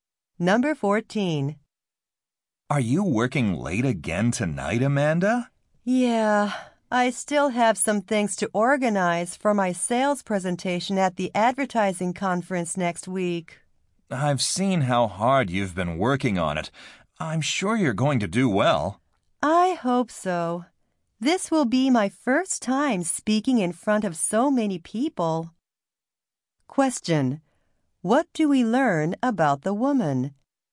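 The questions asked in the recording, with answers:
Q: What do we learn about the woman?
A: She will give her first presentation in front of many people at a conference.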